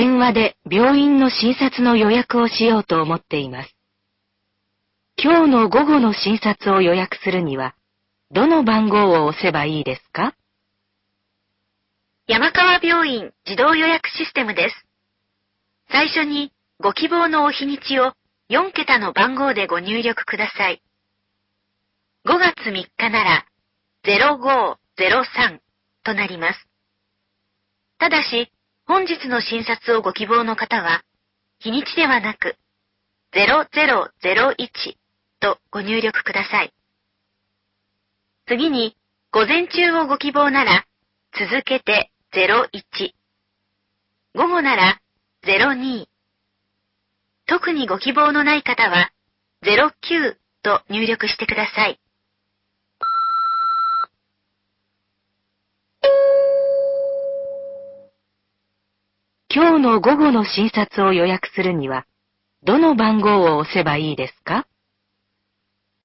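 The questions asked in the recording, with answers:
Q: 今日の午後の診察を予約するには、どの番号を押せばいいですか?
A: 000102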